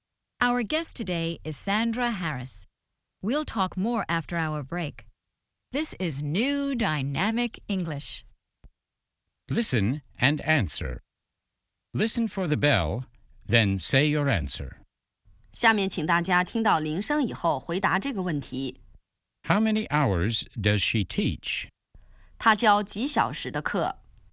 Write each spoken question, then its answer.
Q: How many hours does she teach?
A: She teaches for 2 hours.